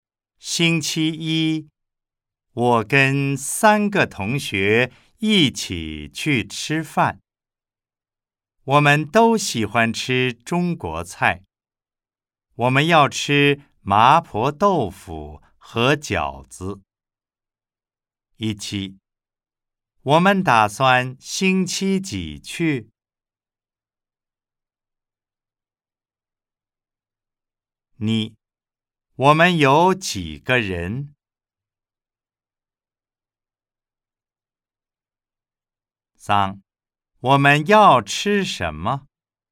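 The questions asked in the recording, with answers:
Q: 我们打算星期几去?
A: 星期一

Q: 我们有几个人?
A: 四个人

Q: 我们要吃什么?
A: 麻婆豆腐和饺子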